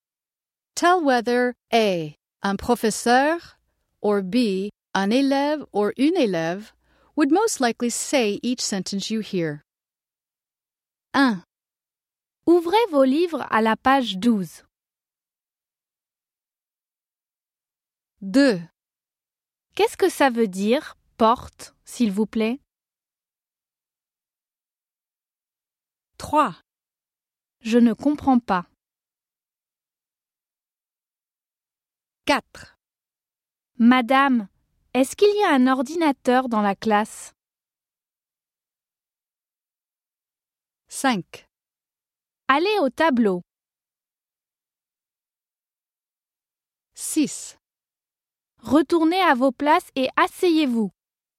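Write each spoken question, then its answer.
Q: Ouvrez vos livres à la page 12.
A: A: un professeur

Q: Qu'est-ce que ça veut dire, porte, s'il vous plaît?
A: B: un élève

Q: Je ne comprends pas.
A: B: un élève

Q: Madame, est-ce qu'il y a un ordinateur dans la classe?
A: B: un élève

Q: Allez au tableau.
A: A: un professeur

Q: Retournez à vos places et asseyez-vous.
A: A: un professeur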